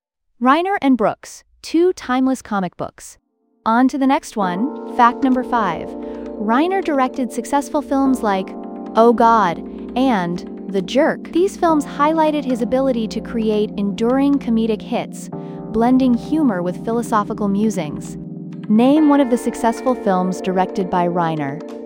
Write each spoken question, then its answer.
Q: Name one of the successful films directed by Reiner.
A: Correct answer, Oh God or The Jerk.